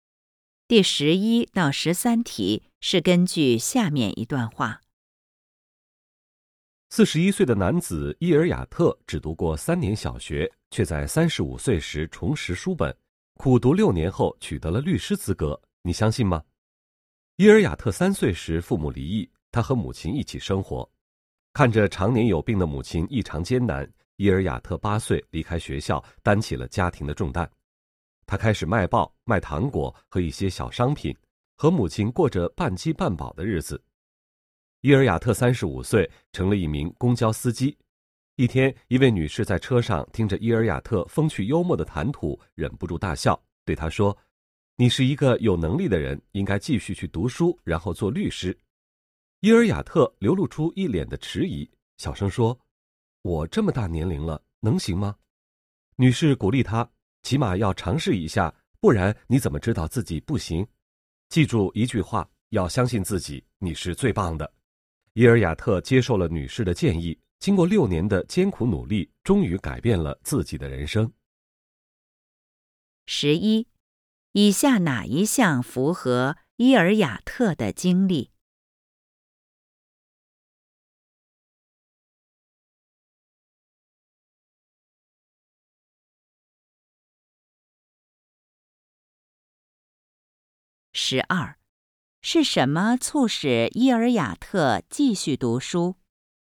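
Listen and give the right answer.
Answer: 一位女乘客的鼓励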